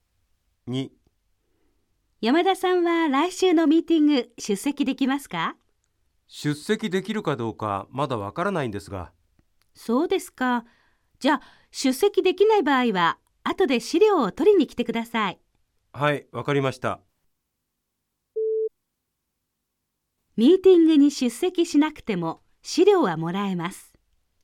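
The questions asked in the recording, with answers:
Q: ミーティングに出席しなくても資料はもらえます。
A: ○(正しい)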